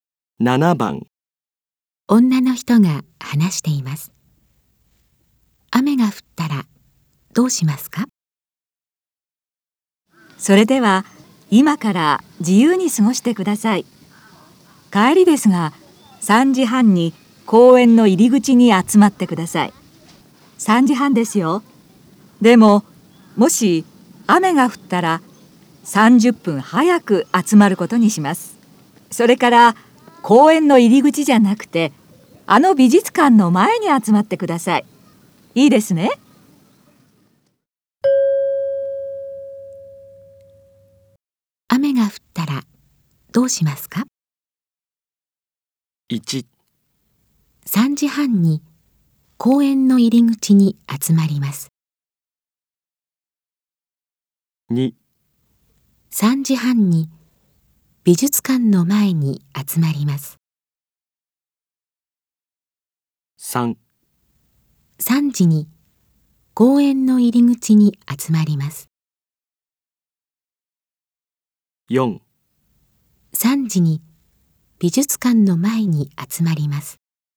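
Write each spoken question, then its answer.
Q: 雨が降ったらどうしますか?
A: 4: 3時に美術館の前に集まります。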